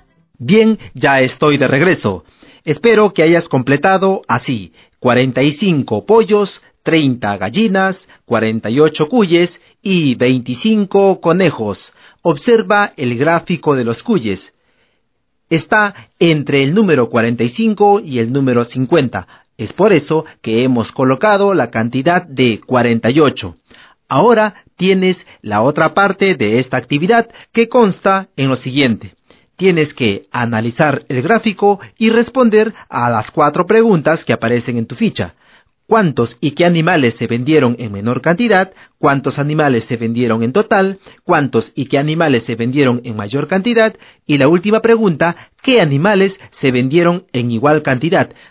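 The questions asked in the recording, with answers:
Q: ¿Cuántos y qué animales se vendieron en menor cantidad?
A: 25 conejos

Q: ¿Cuántos animales se vendieron en total?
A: 148 animales

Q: ¿Cuántos y qué animales se vendieron en mayor cantidad?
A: 48 cuyes

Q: ¿qué animales se vendieron en igual cantidad?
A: Por lo tanto, la respuesta es cero.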